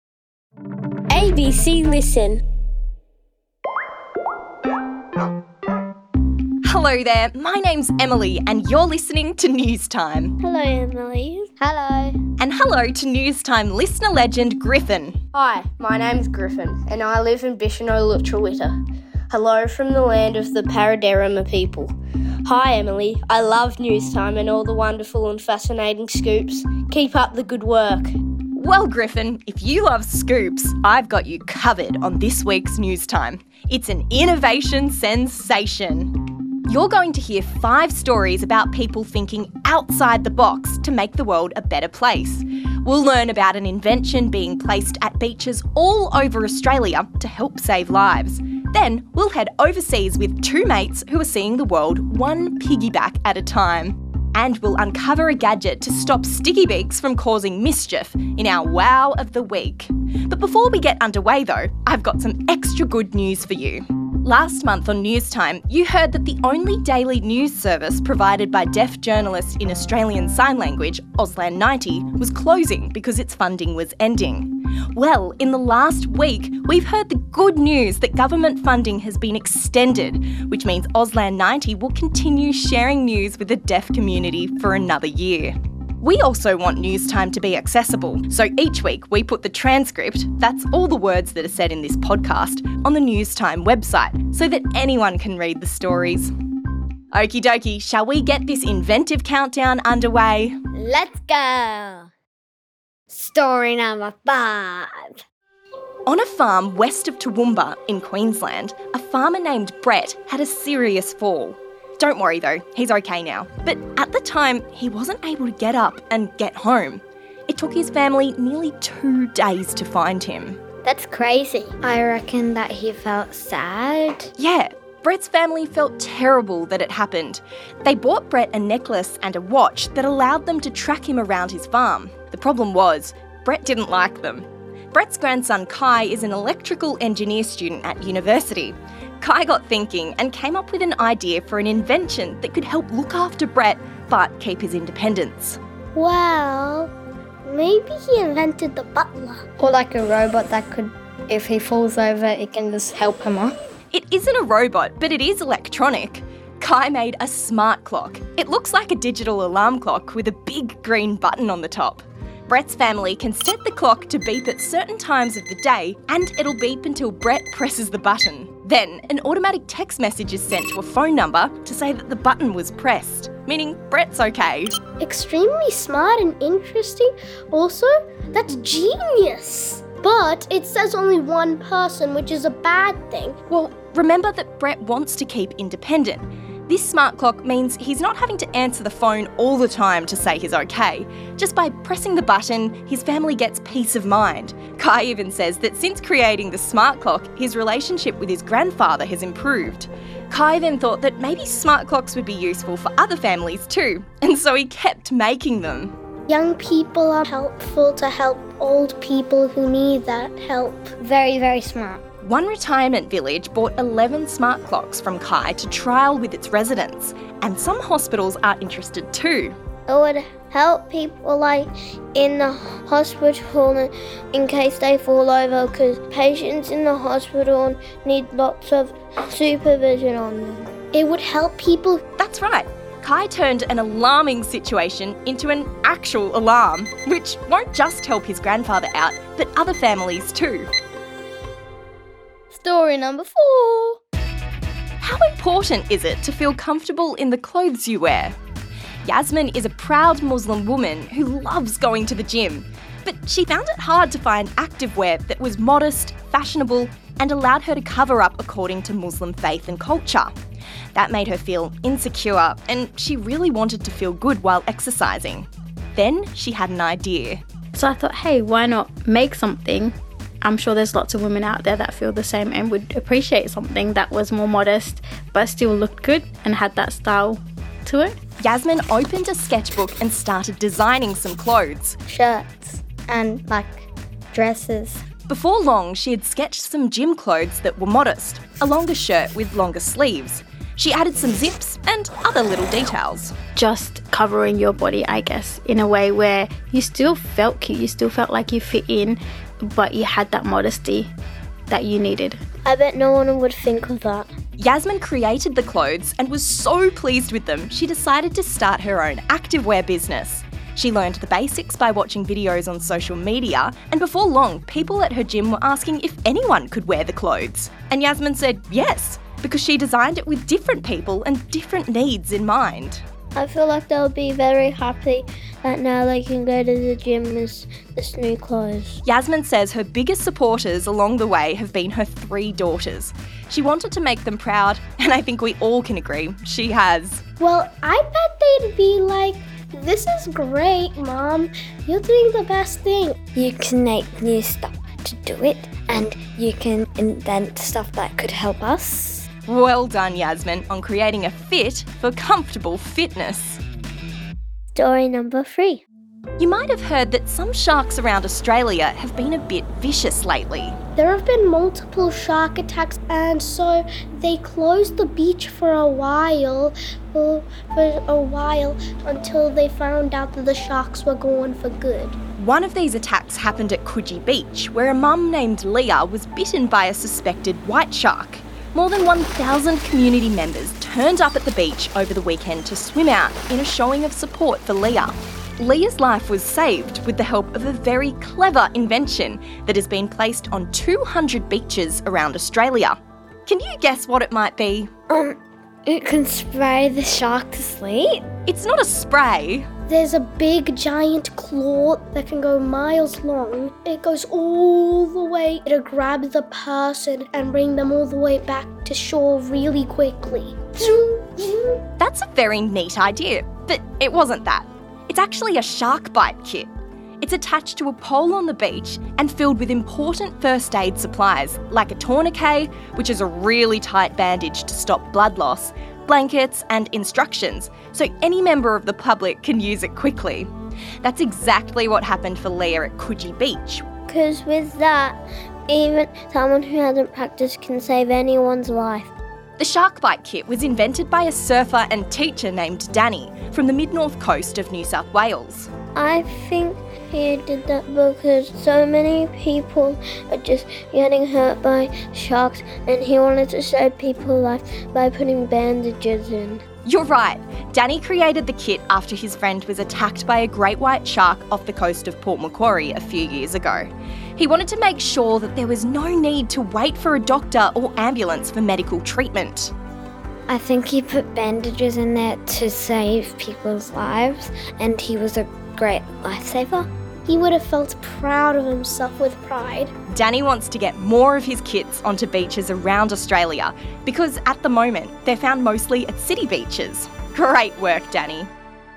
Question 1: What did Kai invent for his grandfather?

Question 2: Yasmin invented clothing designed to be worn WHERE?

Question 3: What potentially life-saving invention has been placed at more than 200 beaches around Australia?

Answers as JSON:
{"1": "A smart clock", "2": "The gym", "3": "Shark bite kit"}